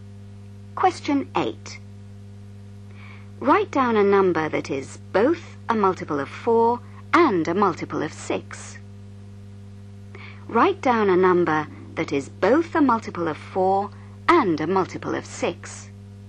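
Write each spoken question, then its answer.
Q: Write down a number that is both a multiple of 4 and a multiple of 6.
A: 12 (or any multiple of 12)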